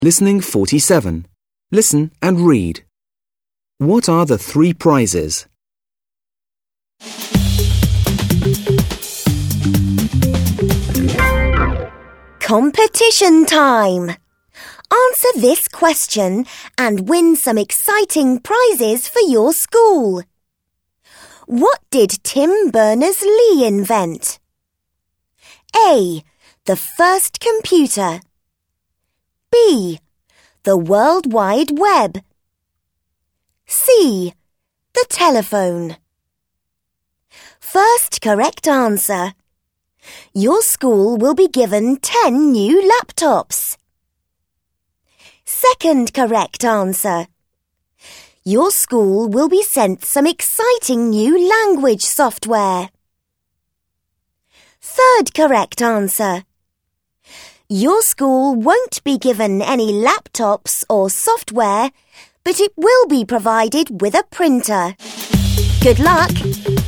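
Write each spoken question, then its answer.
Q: What are the three prizes?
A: 10 new laptops, some new language software, and a printer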